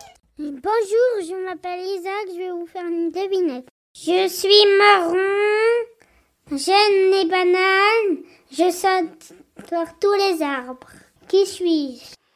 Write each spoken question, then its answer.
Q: Qui suis-je ?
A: Un singe !